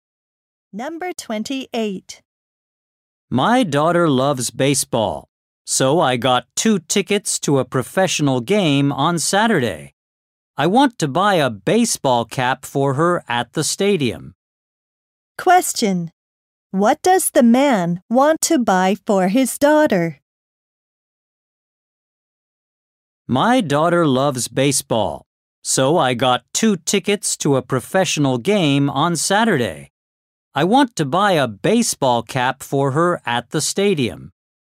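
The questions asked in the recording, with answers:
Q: What does the man want to buy for his daughter?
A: A baseball cap.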